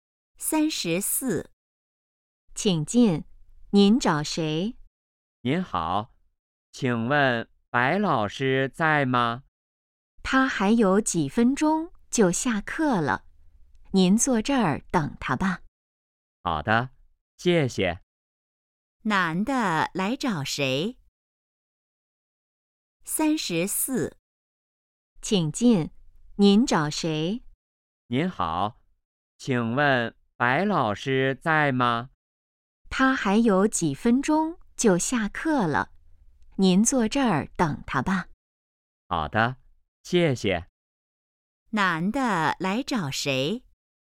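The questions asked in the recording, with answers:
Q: 男的来找谁?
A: 白老师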